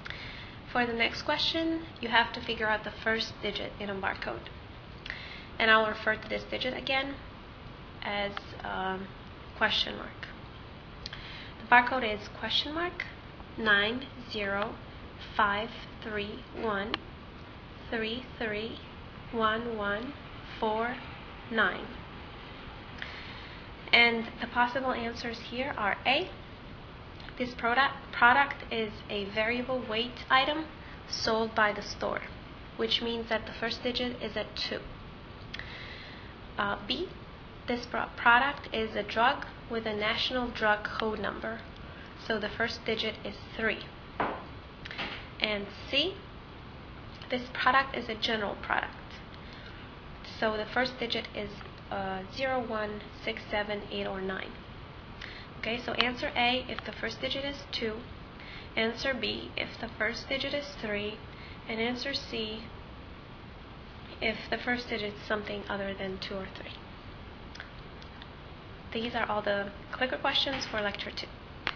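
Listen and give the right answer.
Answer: B: This product is a drug with a national drug code number, so the first digit is 3.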